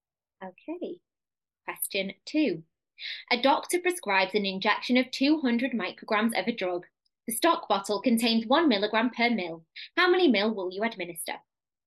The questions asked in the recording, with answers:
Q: How many mil will you administer?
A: So you would give 0.2 mil.